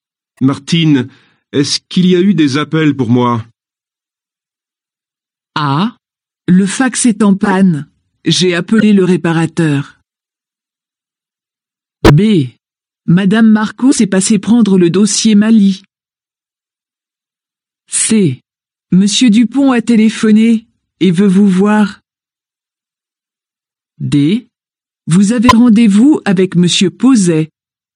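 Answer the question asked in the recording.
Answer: C: Monsieur Dupont a téléphoné et veut vous voir.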